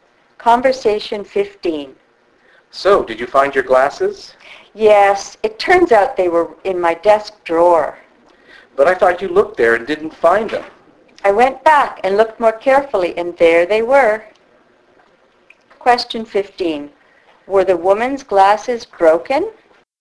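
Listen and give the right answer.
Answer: No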